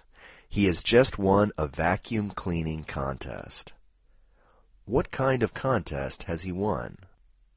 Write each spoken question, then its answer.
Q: What kind of contest has he won?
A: He has won a vacuum cleaning contest.